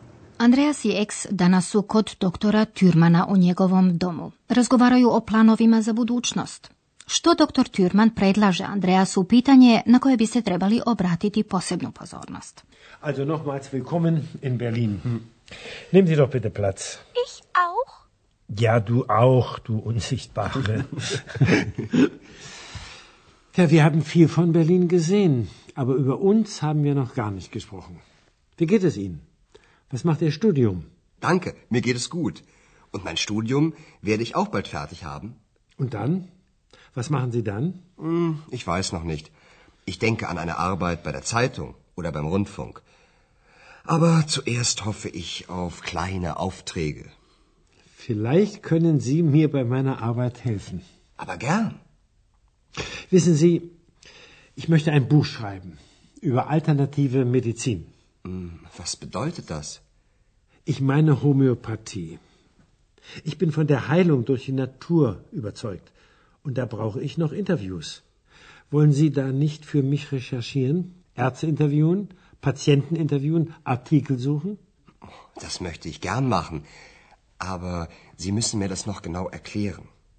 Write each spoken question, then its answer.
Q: Što doktor Türman predlaže Andreasu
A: doktor Türman pita Andreasa ne bi li mu pomogao pri prikupljanju materijala o alternativnoj medicini